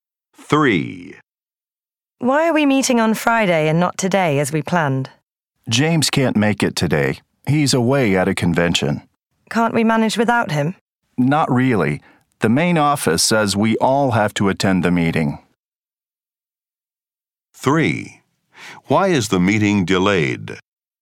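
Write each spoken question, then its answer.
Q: Why is the meeting delayed?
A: James is away at a convention and everyone must attend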